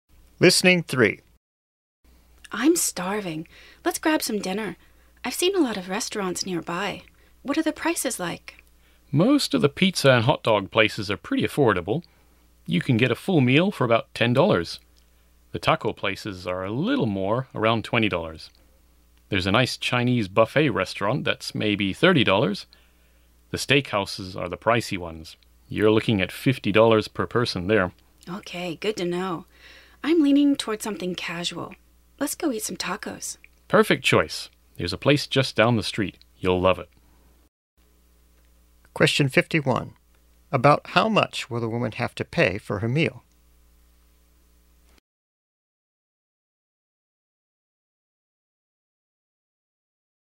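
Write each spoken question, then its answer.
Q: About how much will the woman have to pay for her meal?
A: About $20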